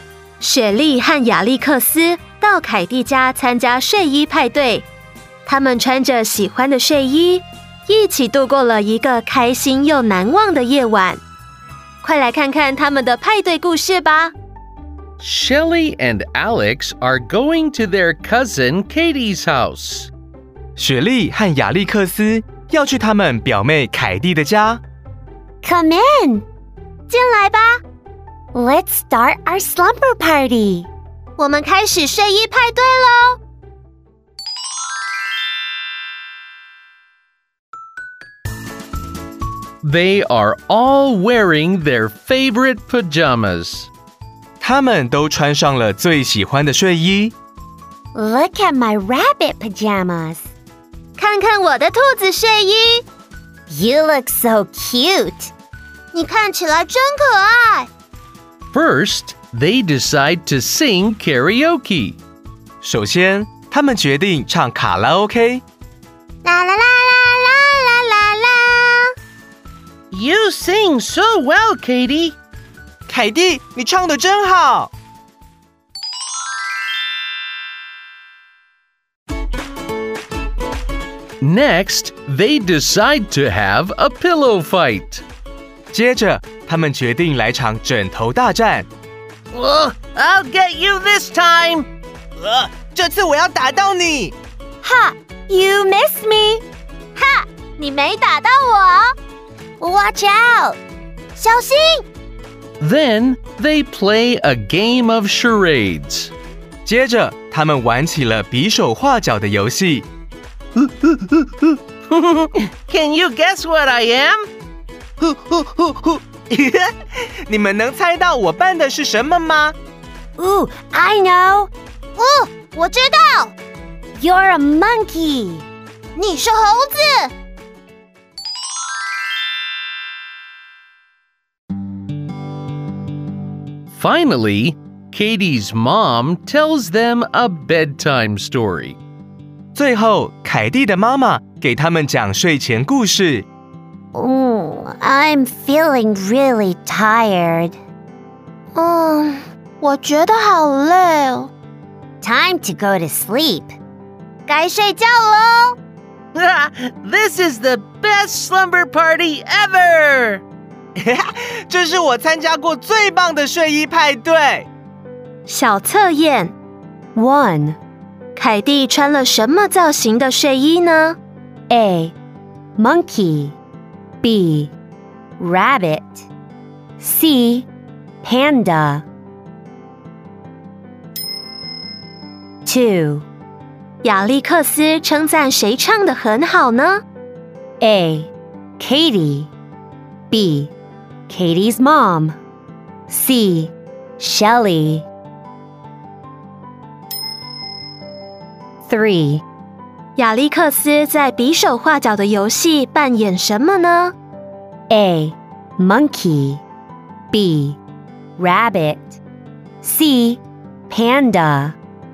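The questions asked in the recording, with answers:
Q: 亚历克斯称赞谁唱得很好呢?A. Katie B. Katie's mom C. Shelley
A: A: Katie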